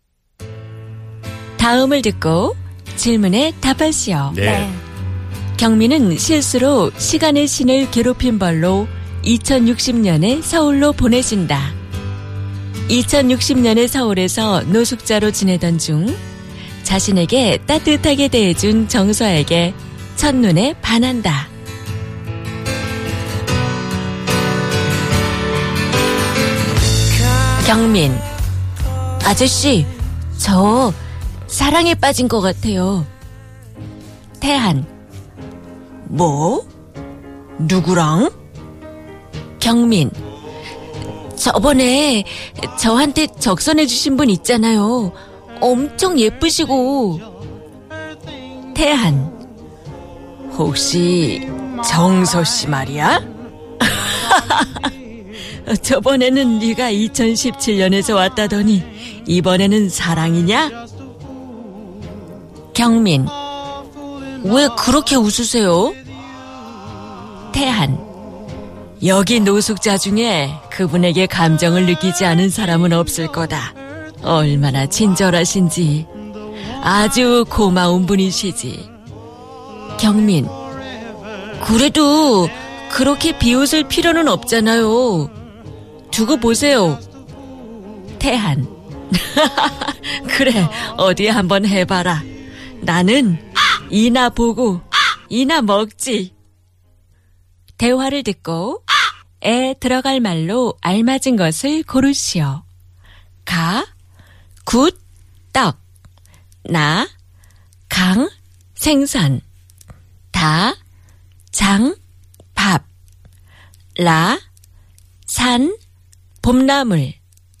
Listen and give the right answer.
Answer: Ga, 나는 굳이나 보고 떡이나 먹지.